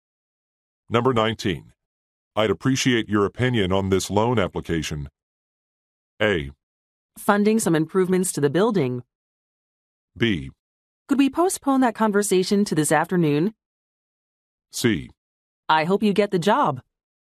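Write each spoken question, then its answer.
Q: I'd appreciate your opinion on this loan application.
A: B: Could we postpone that conversation to this afternoon?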